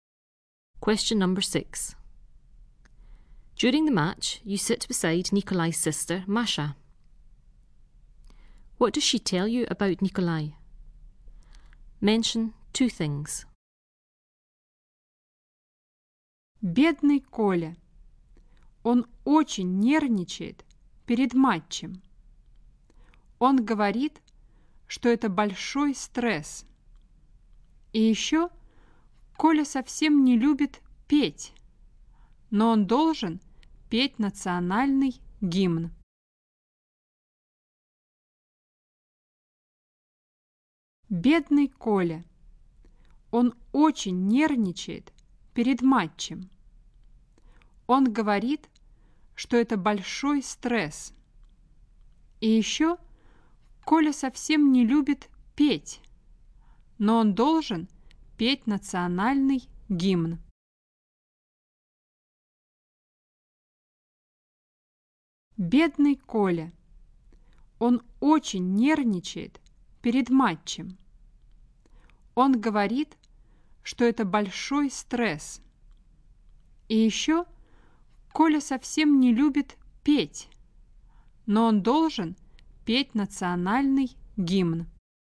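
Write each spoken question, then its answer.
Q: What does she tell you about Nikolai?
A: He is very nervous before a match (it's very stressful); he doesn't like singing but has to sing the national anthem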